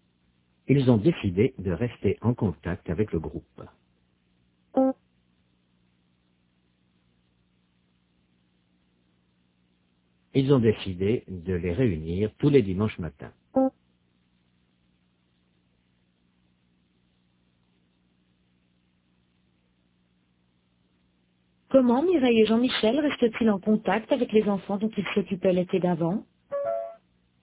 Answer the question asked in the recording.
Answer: Ils les réunissent tous les dimanches matins.